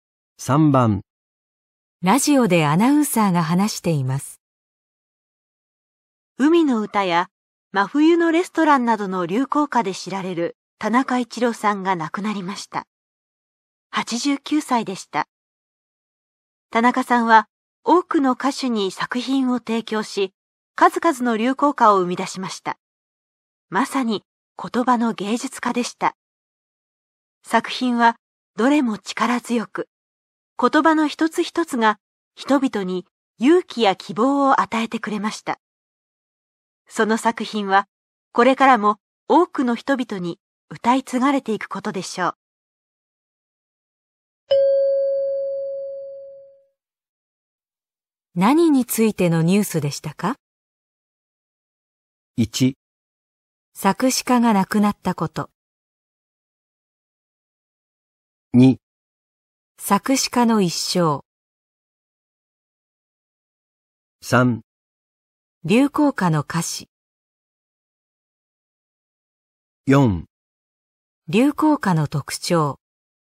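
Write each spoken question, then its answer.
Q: 何についてのニュースでしたか?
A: 1: 作詞家が亡くなったこと。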